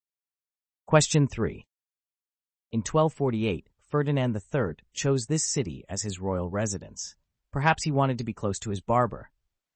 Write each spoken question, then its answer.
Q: In 1248, Ferdinand III chose this city as his royal residence.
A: The answer is Seville.